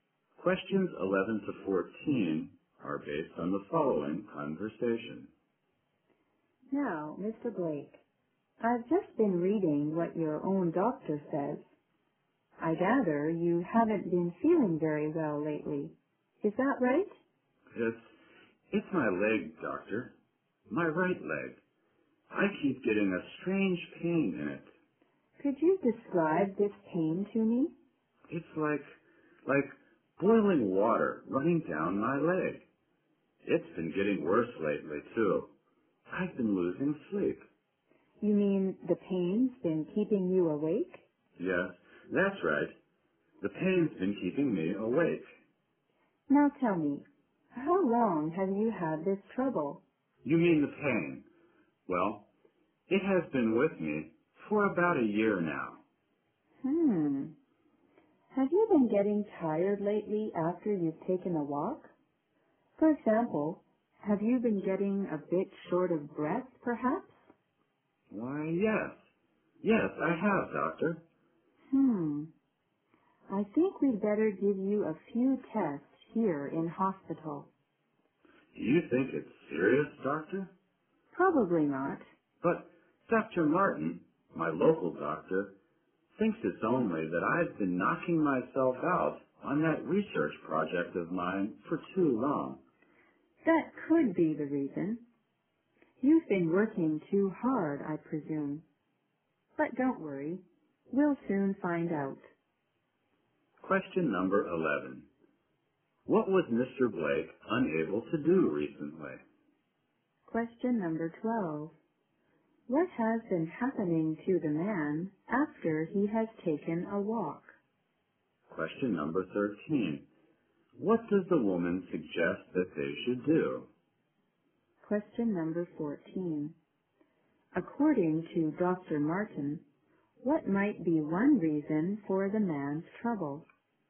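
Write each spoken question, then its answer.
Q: What was Mr. Blake unable to do recently?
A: Sleep well; the pain in his leg kept him awake

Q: What has been happening to the man after he has taken a walk?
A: He gets tired and a bit short of breath

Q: What does the woman suggest that they should do?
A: Give him a few tests in hospital

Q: According to Dr. Martin, what might be one reason for the man's trouble?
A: He has been working too hard on his research project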